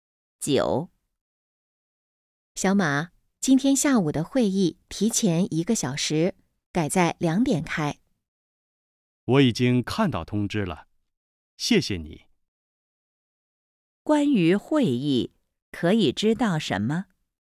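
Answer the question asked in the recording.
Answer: 提前一个小时,改在两点开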